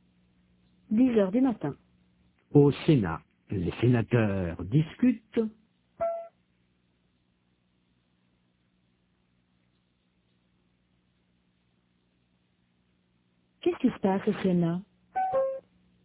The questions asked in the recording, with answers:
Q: Qu'est-ce qui se passe au Sénat?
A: Les sénateurs discutent.